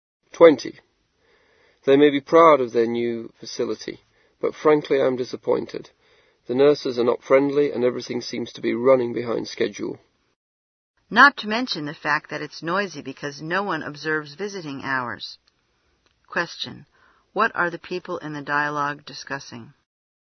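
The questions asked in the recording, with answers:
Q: What are the people in the dialogue discussing?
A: A hospital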